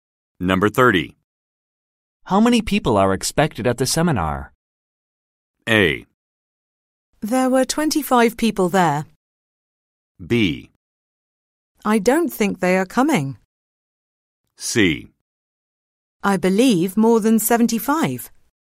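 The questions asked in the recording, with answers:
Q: How many people are expected at the seminar?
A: C: I believe more than 75.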